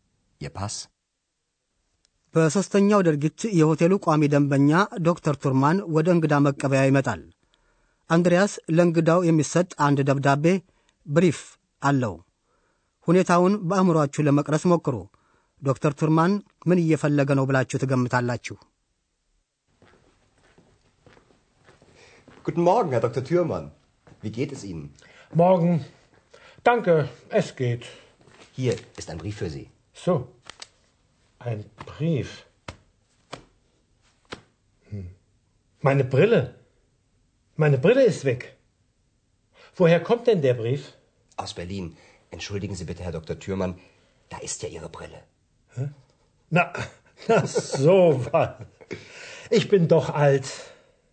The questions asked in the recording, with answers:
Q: ዶክተር ቱርማን ምን እየፈለገ ነው ብላችሁ ትገምታላችሁ?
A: ለዚሁም ብሪለ መነጽሩን ይፈልጋል።